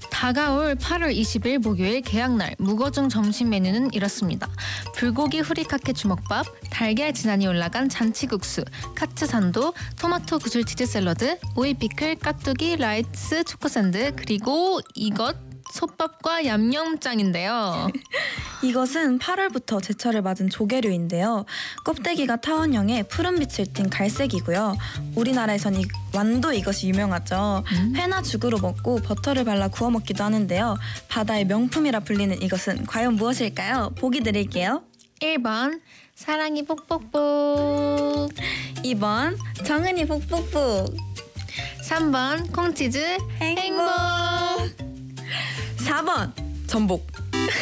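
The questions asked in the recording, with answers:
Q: 바다의 명품이라 불리는 이것은 과연 무엇일까요?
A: 4: 전복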